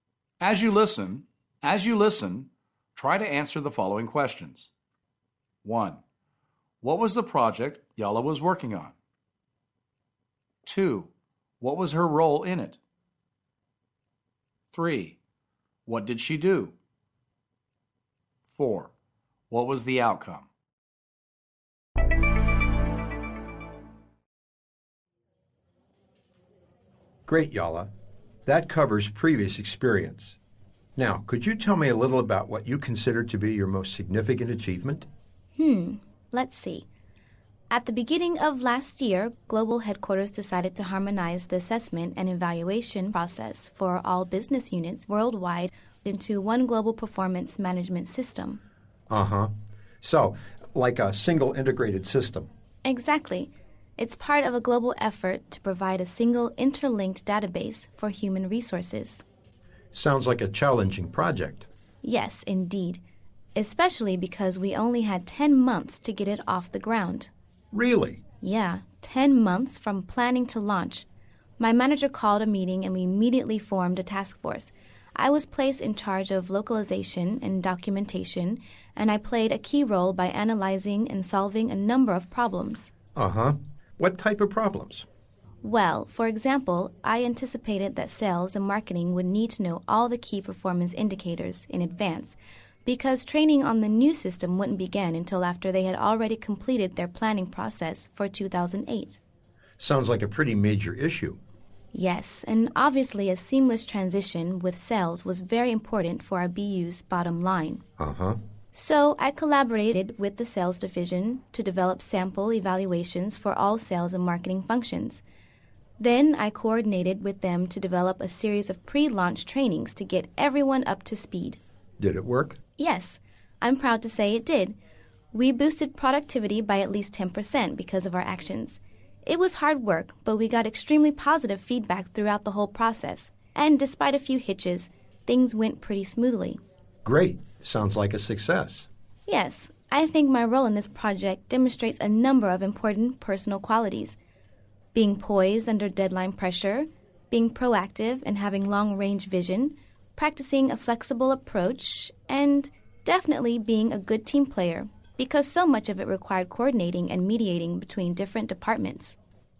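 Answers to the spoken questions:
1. Bringing the assessment and evaluation process for all business units worldwide into one global performance management system
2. She was in charge of localization and documentation
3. She saw that sales and marketing would need the KPIs early, so she worked with the sales division on sample evaluations and pre-launch trainings
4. Productivity went up by at least 10%, feedback was very positive, and things went smoothly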